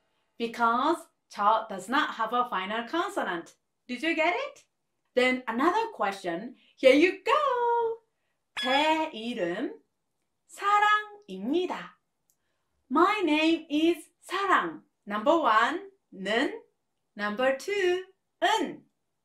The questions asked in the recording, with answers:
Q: 제 이름 사랑입니다. My name is 사랑. Number one는 Number two은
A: The answer is number two은